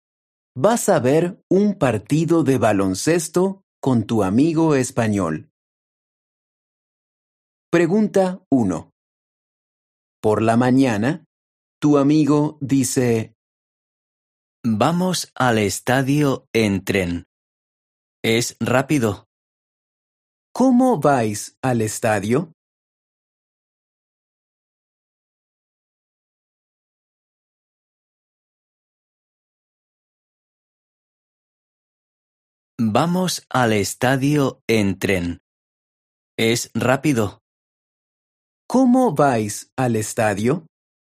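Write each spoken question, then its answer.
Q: ¿Cómo vais al estadio?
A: En tren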